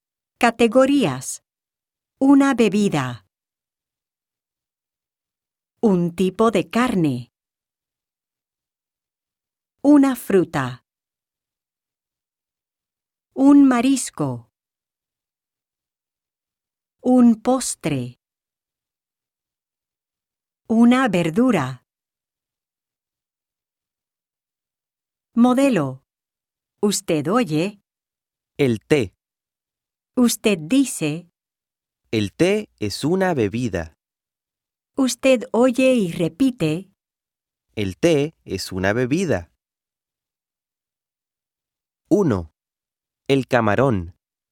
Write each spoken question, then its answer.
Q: El camarón.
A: El camarón es un marisco.